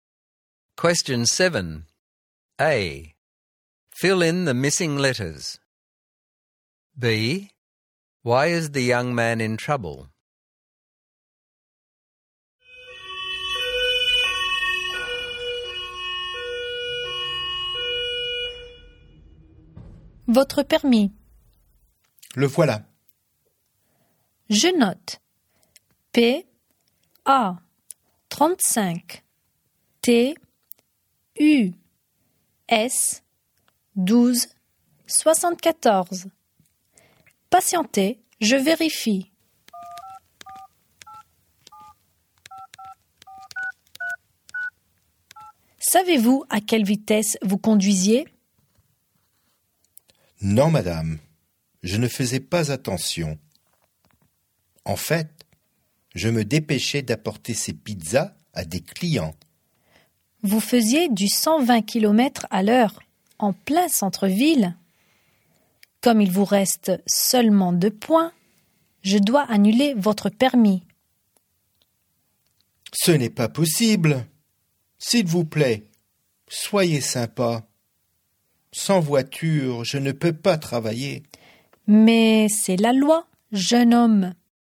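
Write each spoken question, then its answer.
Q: B. Why is the young man in trouble?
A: He was speeding at 120 km/h in the city centre, so his licence will be cancelled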